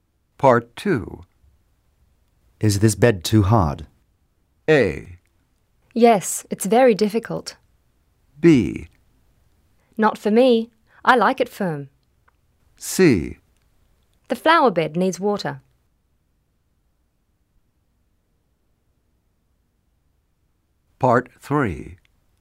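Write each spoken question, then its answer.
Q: Is this bed too hard?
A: B: Not for me. I like it firm.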